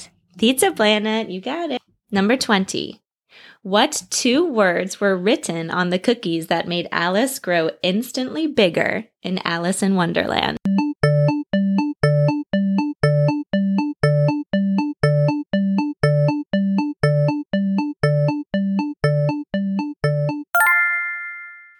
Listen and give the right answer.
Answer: You got it. The cookie said, "Eat me."